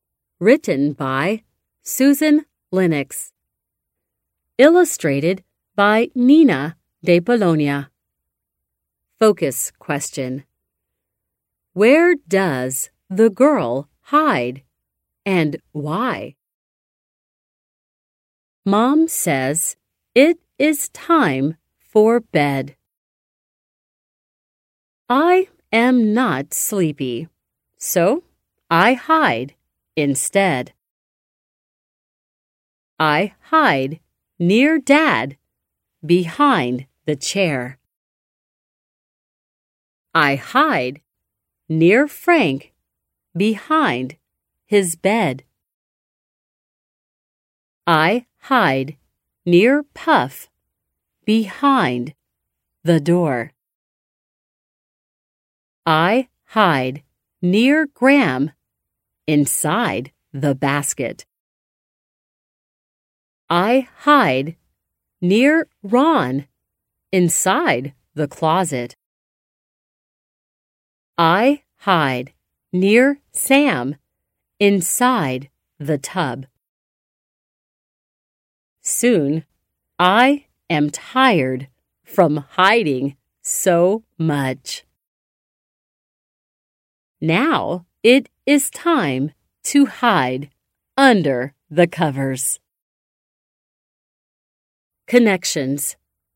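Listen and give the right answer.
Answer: She hides around the house (behind the chair, bed, door, inside the basket, closet, tub) because she is not sleepy.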